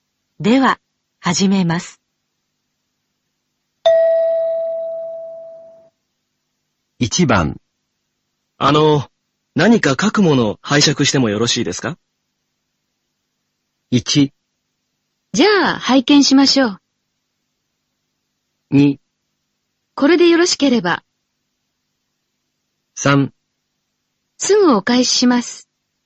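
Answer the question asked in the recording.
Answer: 2: これでよろしければ。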